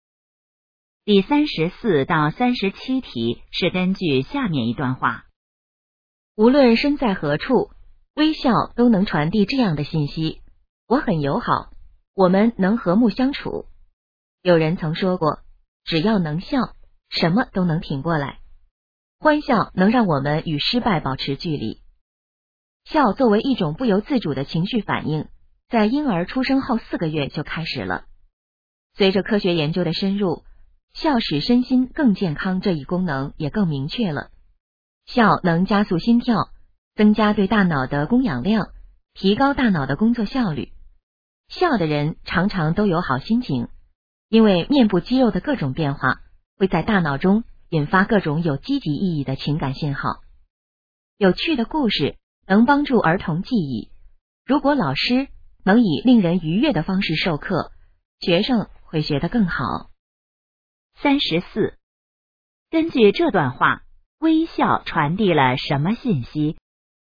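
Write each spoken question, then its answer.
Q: 根据这段话,微笑传递了什么信息?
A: 我很友好,我们能和睦相处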